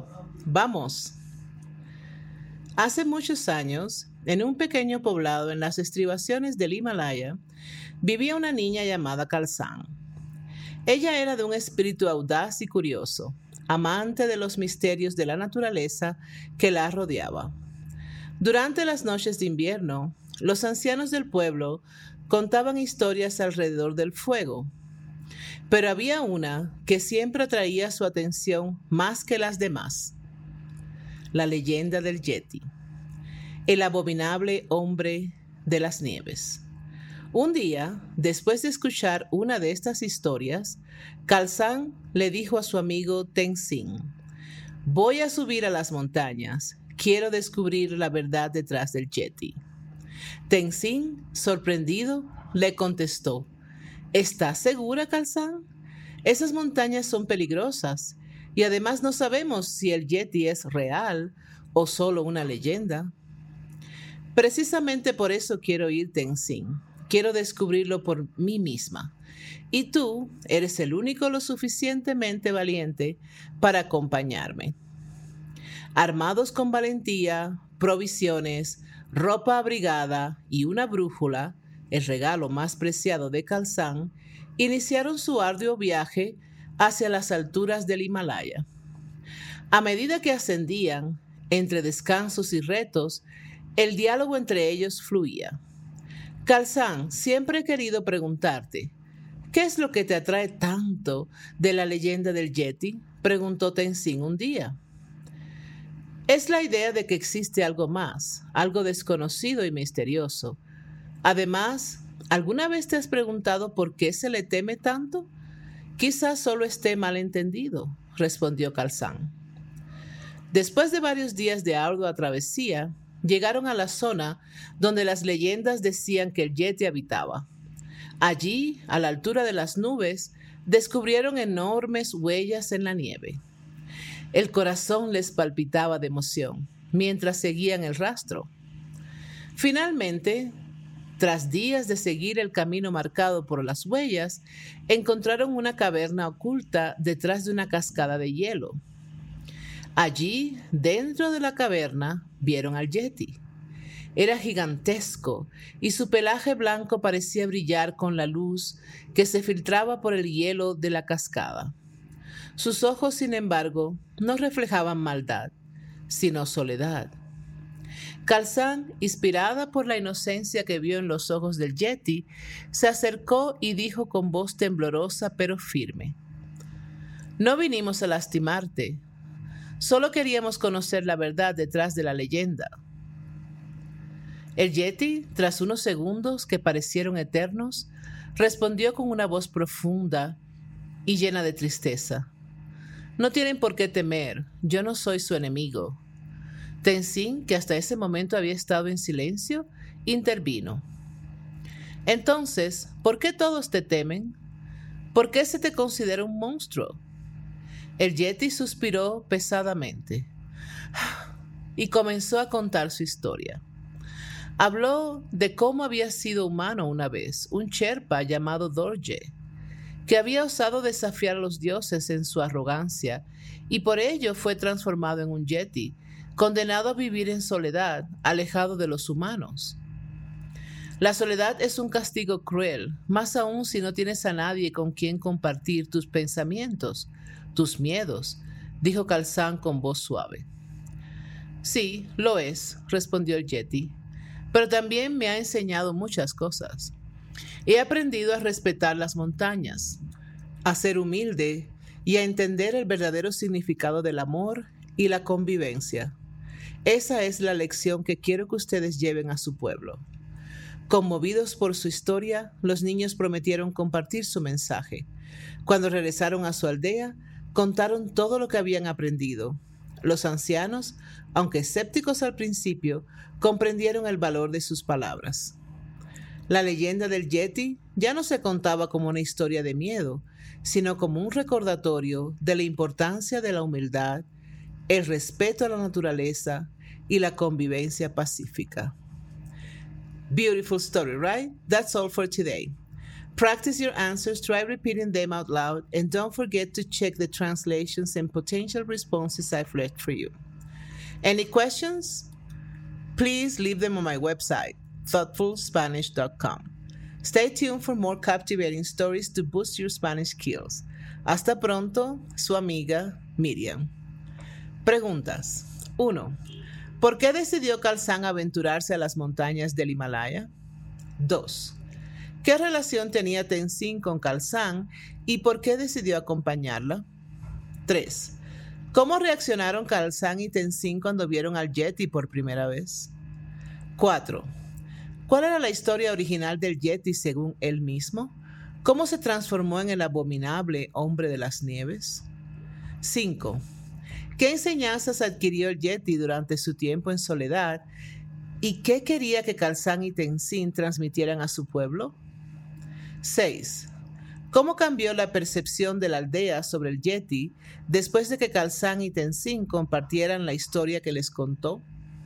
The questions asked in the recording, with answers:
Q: ¿Por qué decidió Calzán aventurarse a las montañas del Himalaya?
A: Calzán decidió aventurarse a las montañas del Himalaya para descubrir la verdad detrás de la leyenda del Yeti.

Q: ¿Qué relación tenía Tenzin con Calzán y por qué decidió acompañarla?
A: Tenzin era amigo de Calzán y decidió acompañarle en su aventura porque era valiente y compartía su curiosidad.

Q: ¿Cuál era la historia original del Yeti según él mismo? ¿Cómo se transformó en el abominable hombre de las nieves?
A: Según la historia del Yeti, él había sido un humano llamado Dorje, un Sherpa, que fue transformado en Yeti como castigo por desafiar a los dioses.

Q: ¿Qué enseñanzas adquirió el Yeti durante su tiempo en soledad? ¿Y qué quería que Calzán y Tenzin transmitieran a su pueblo?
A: Durante su tiempo en soledad, el Yeti aprendió a respetar la naturaleza, a ser humilde y entendió el valor de la convivencia y el amor.

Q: ¿Cómo cambió la percepción de la aldea sobre el Yeti después de que Calzán y Tenzin compartieran la historia que les contó?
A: Después de que Calzán y Tenzin compartieran la historia del Yeti, la aldea ya no lo veía como un monstruo temible, sino como un recordatorio de la importancia de la humildad, el respeto a la naturaleza y la convivencia pacífica.